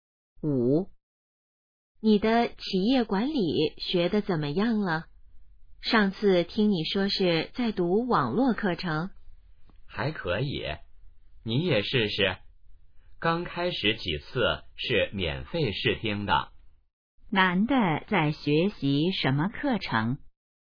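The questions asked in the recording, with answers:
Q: 男的在学习什么课程?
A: 企业管理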